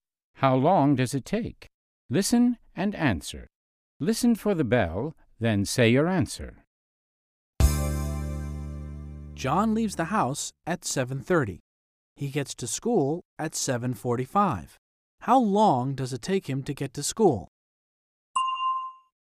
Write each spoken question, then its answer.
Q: How long does it take him to get to school?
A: It takes him 15 minutes. It takes him 15 minutes to get to school.